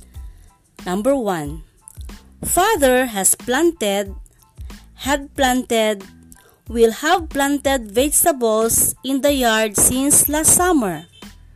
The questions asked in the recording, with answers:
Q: Father has planted, had planted, will have planted vegetables in the yard since last summer.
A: The answer is has planted.